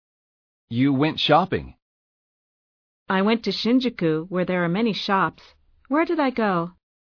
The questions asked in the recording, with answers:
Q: Where did I go?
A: You went to Shinjuku, where there are many shops.